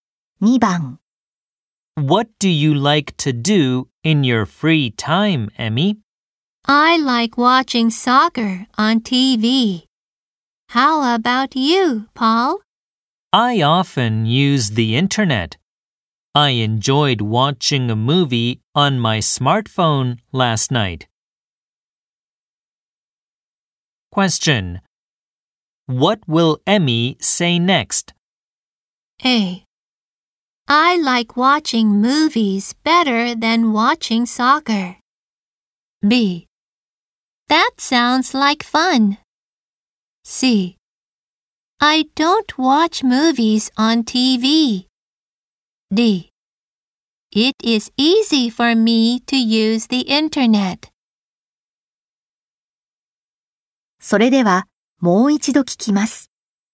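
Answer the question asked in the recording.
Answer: B: That sounds like fun.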